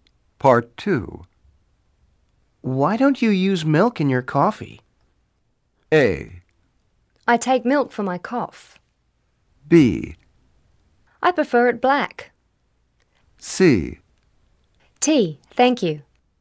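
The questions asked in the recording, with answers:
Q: Why don't you use milk in your coffee?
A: B: I prefer it black.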